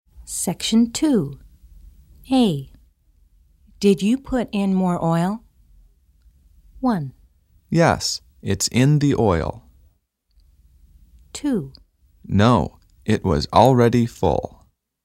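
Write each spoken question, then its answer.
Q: Did you put in more oil?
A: 2: No, it was already full.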